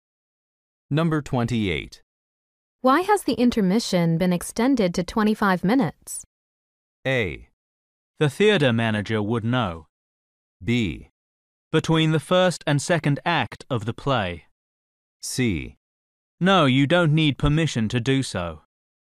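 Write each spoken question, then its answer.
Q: Why has the intermission been extended to 25 minutes?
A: A: The theater manager would know.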